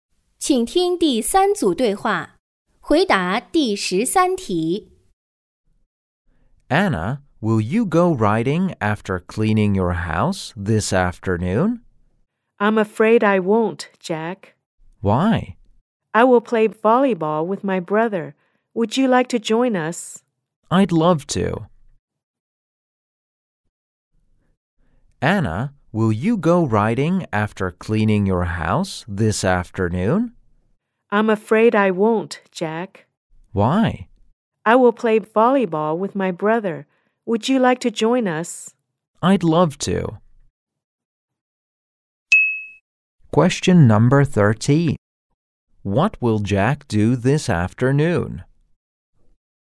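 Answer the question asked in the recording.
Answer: Play volleyball with Anna and her brother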